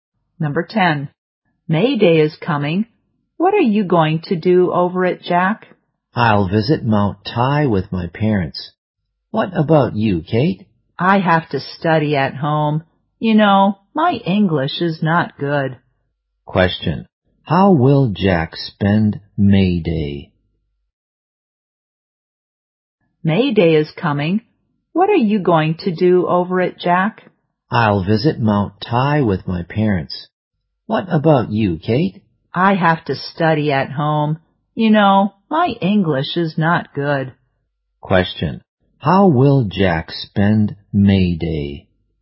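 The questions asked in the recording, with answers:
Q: How will Jack spend May Day?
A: He will visit Mount Tai with his parents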